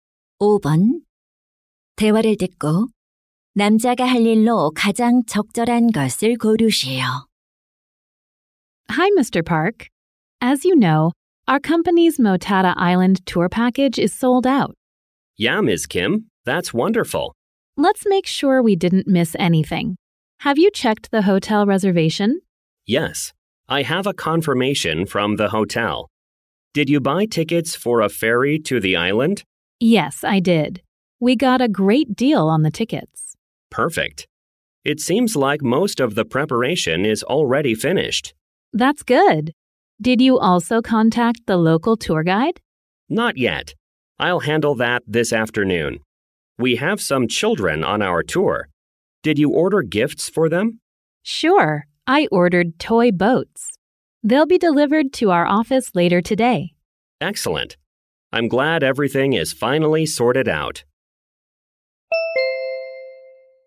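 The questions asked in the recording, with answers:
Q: 대화를 듣고 남자가 할 일로 가장 적절한 것을 고르시오.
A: 현지 투어 가이드에게 연락하기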